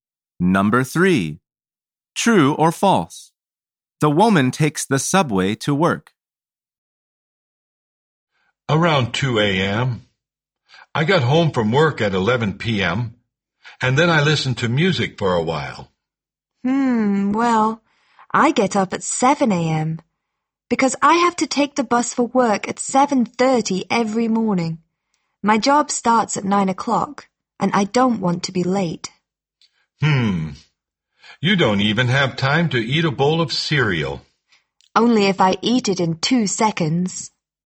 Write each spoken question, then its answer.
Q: True or false? The woman takes the subway to work.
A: The answer is false.